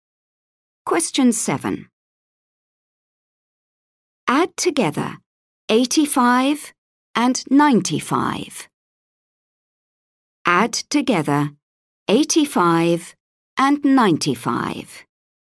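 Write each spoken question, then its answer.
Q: Add together 85 and 95.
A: 180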